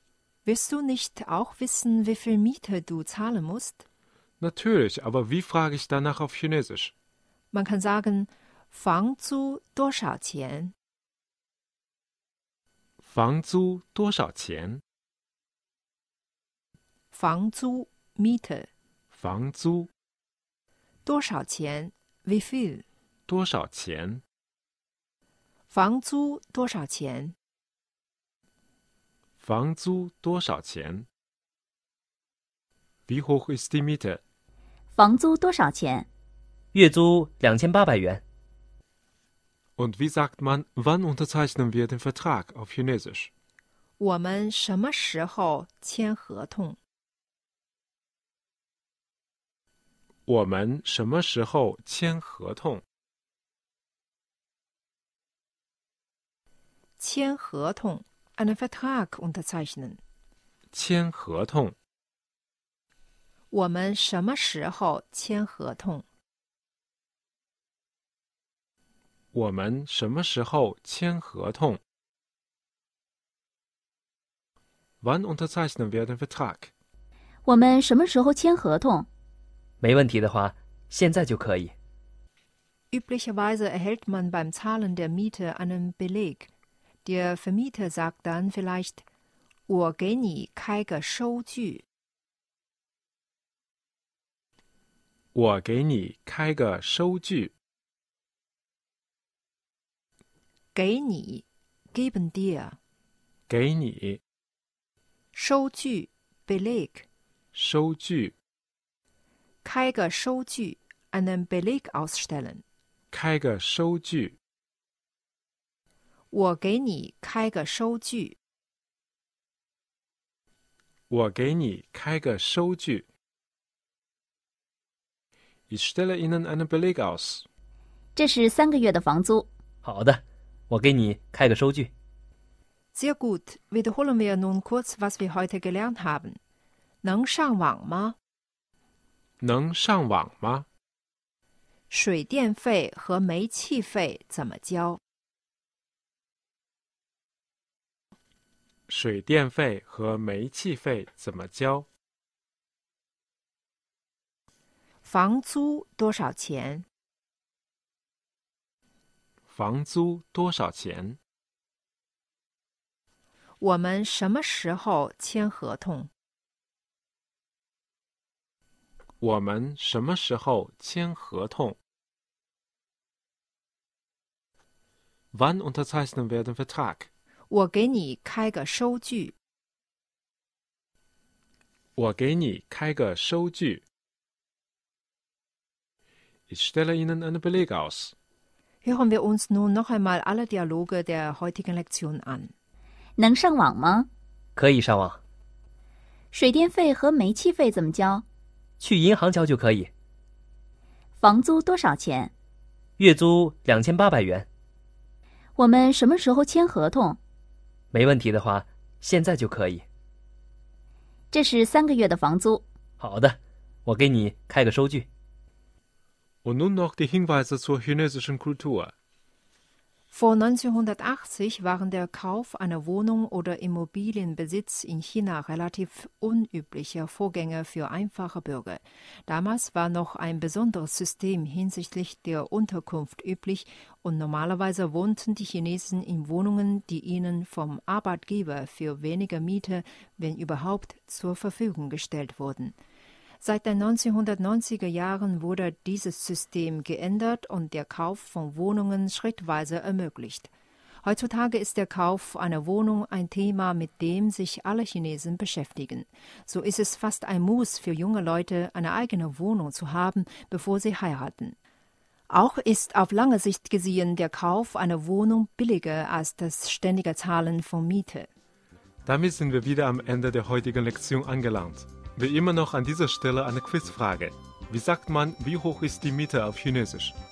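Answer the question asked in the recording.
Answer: 房租多少钱?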